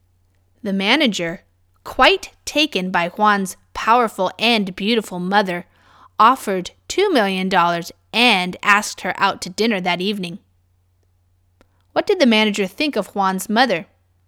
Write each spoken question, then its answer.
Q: What did the manager think of Juan's mother?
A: He thought she was very powerful and beautiful.